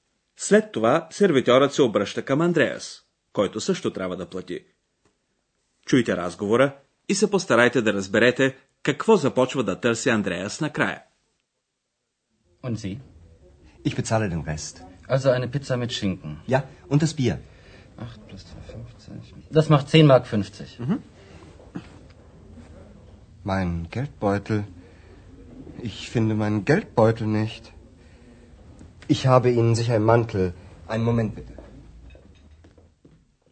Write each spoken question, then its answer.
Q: Чуйте разговора и се постарайте да разберете какво започва да търси Андреас накрая.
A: Андреас започва да търси портмонето си.